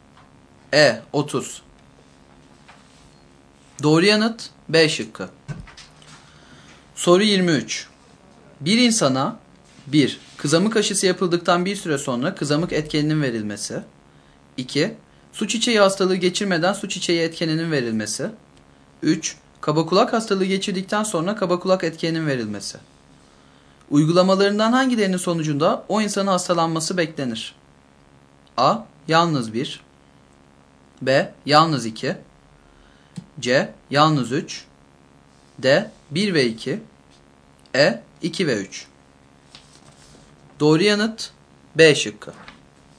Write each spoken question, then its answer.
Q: Uygulamalarından hangilerinin sonucunda o insanın hastalanması beklenir?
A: Doğru yanıt B şıkkı.